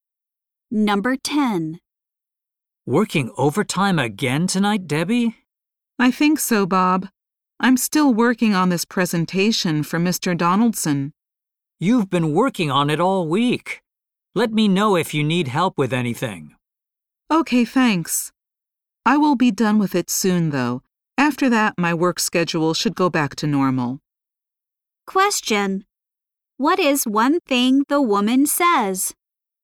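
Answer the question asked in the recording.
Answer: She will finish her presentation soon.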